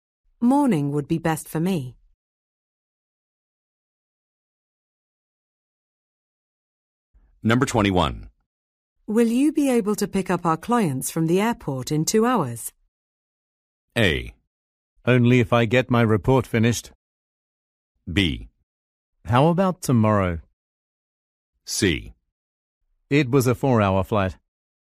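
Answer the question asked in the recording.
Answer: A: Only if I get my report finished.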